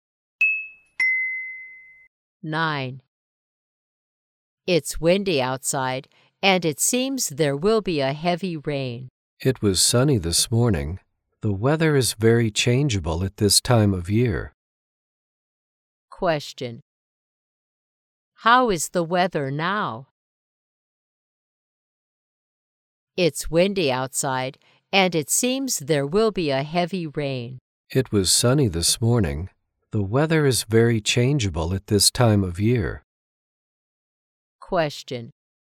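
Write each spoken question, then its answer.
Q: How is the weather now?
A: Windy, and it seems it will rain heavily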